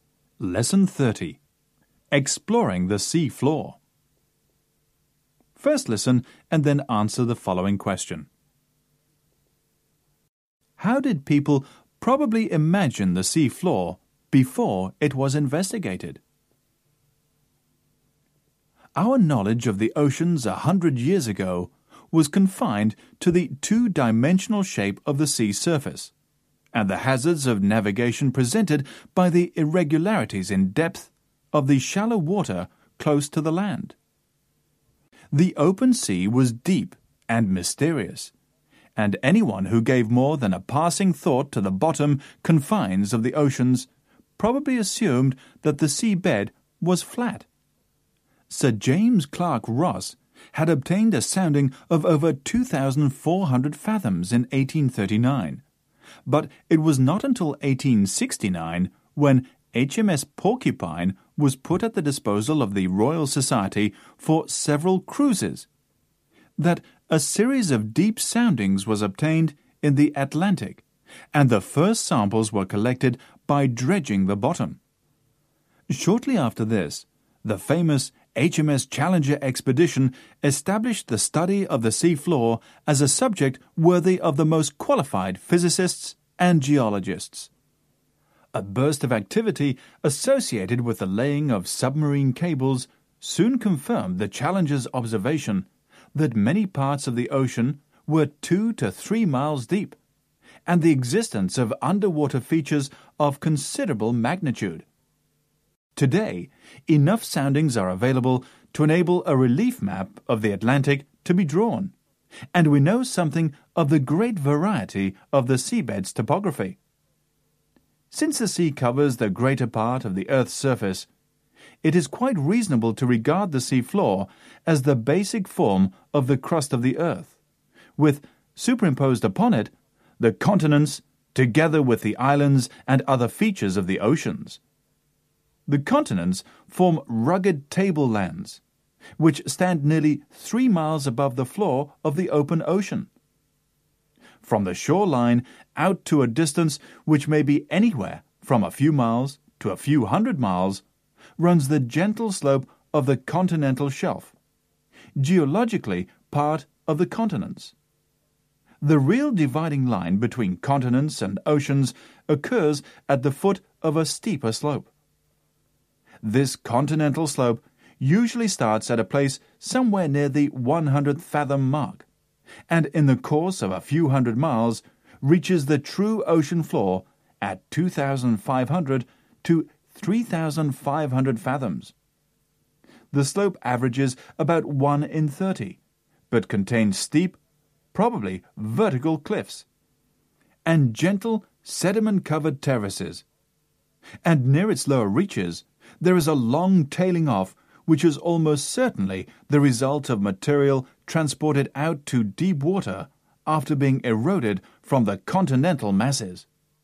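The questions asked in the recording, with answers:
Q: How did people probably imagine the sea floor before it was investigated?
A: As flat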